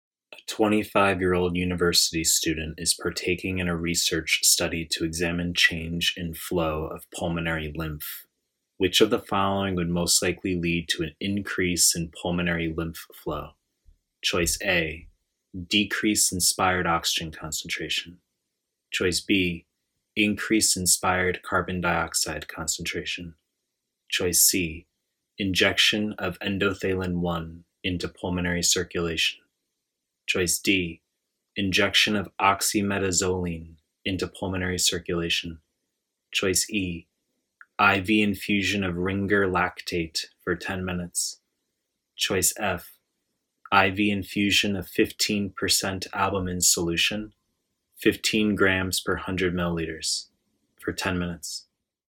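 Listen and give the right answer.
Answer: E: IV infusion of Ringer lactate for 10 minutes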